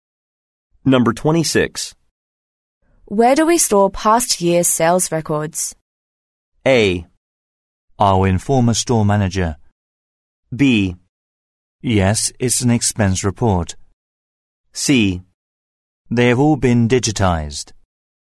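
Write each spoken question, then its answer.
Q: Where do we store past year's sales records?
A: C: They have all been digitized.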